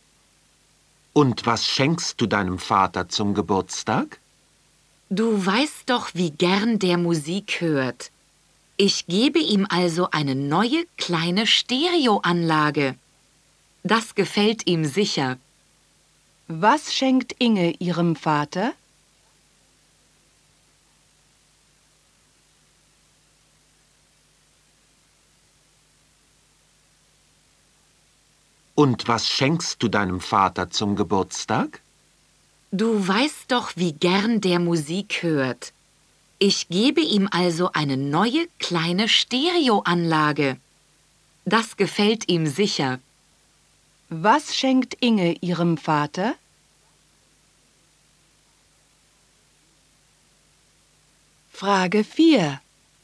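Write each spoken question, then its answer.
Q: Was schenkt Inge ihrem Vater?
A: Eine neue kleine Stereoanlage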